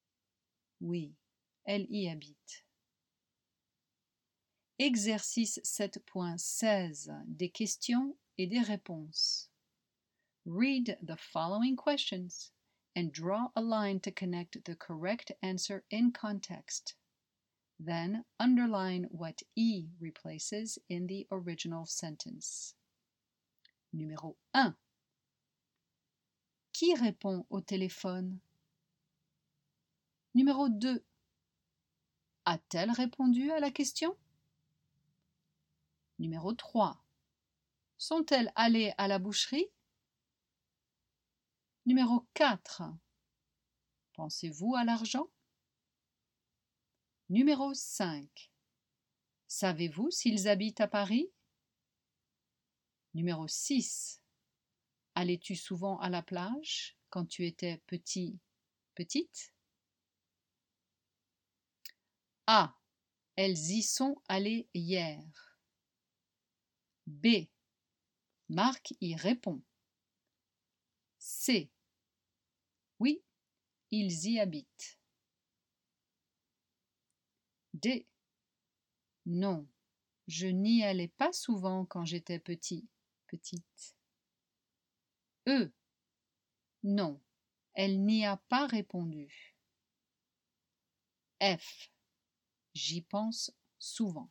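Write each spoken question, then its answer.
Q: Qui répond au téléphone?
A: B: Marc y répond.

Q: A-t-elle répondu à la question?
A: E: Non, elle n'y a pas répondu.

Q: Sont-elles allées à la boucherie?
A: A: Elles y sont allées hier.

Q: Pensez-vous à l'argent?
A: F: J'y pense souvent.

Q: Savez-vous s'ils habitent à Paris?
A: C: Oui, ils y habitent.

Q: Allais-tu souvent à la plage quand tu étais petite?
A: D: Non, je n'y allais pas souvent quand j'étais petite.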